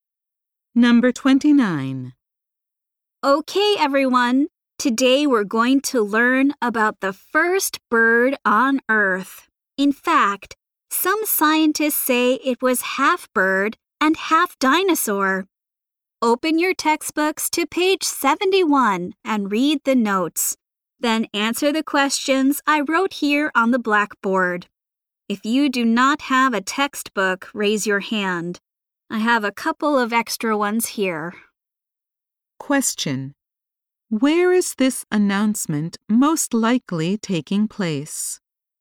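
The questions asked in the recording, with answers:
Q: Where is this announcement most likely taking place?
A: In a classroom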